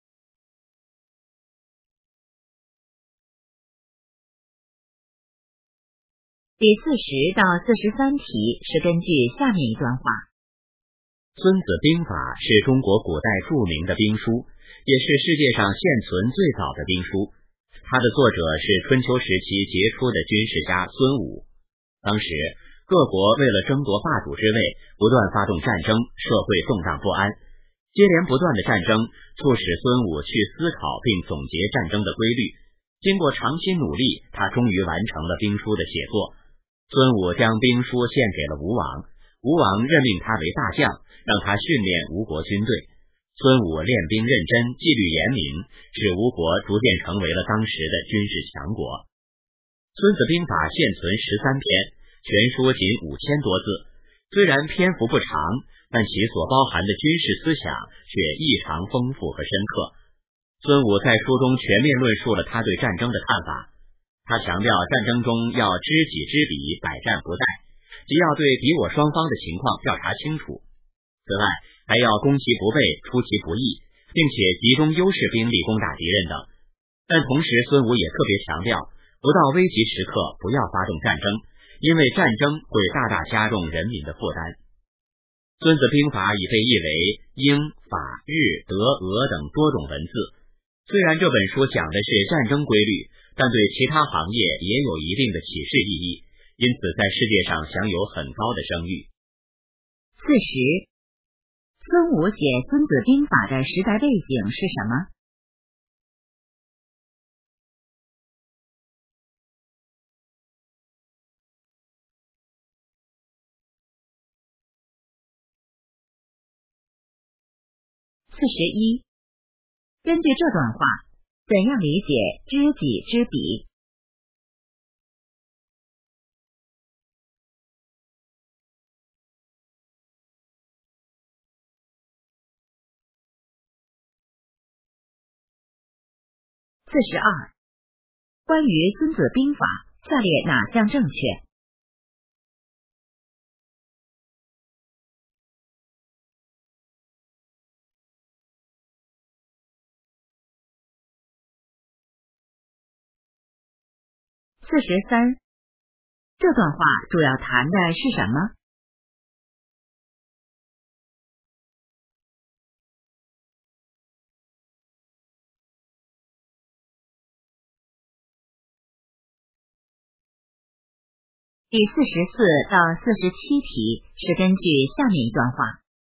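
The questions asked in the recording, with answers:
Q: 孙武写《孙子兵法》的时代背景是什么?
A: 各国争霸,战争不断,社会动荡不安

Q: 根据这段话,怎样理解知己知彼?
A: 对敌我双方的情况调查清楚

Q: 这段话主要谈的是什么?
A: 《孙子兵法》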